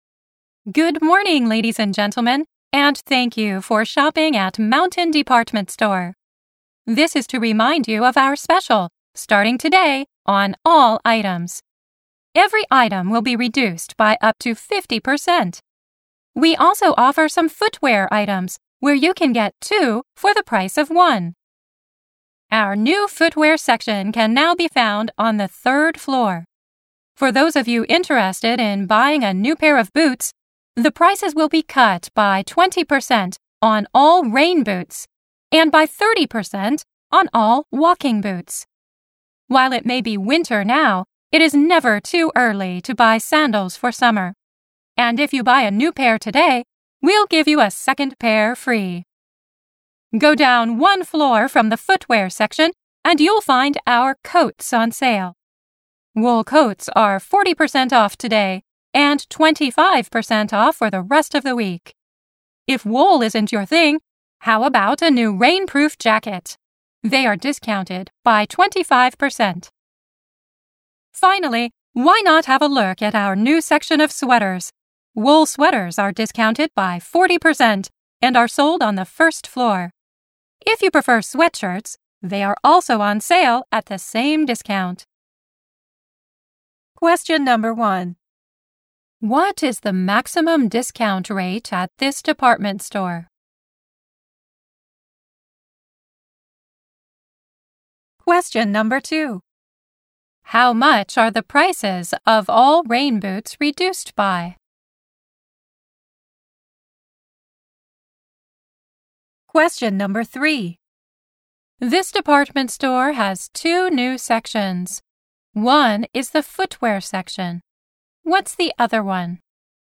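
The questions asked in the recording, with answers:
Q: What is the maximum discount rate at this department store?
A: 50%

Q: How much are the prices of all rain boots reduced by?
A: 20%

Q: This department store has two new sections. One is the footwear section. What's the other one?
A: The sweater section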